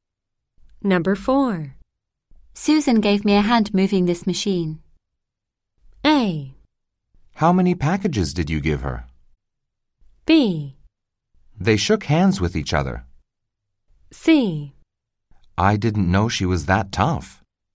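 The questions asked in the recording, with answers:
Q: Susan gave me a hand moving this machine.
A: C: I didn't know she was that tough.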